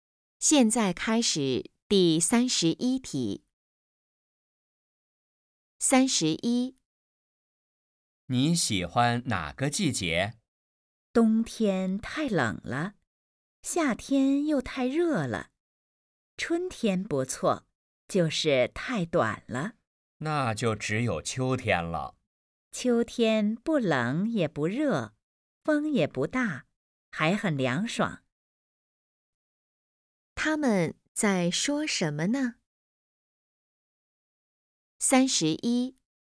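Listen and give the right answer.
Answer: 季节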